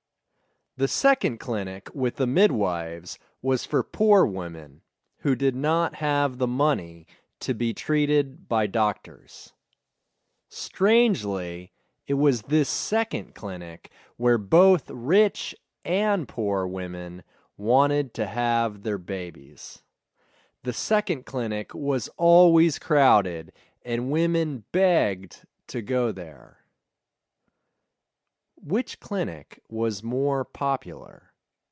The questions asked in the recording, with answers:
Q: Which clinic was more popular?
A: The second clinic was more popular.